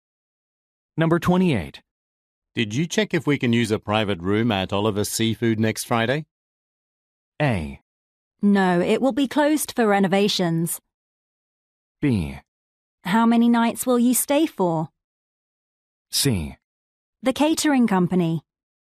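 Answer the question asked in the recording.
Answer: A: No, it will be closed for renovations.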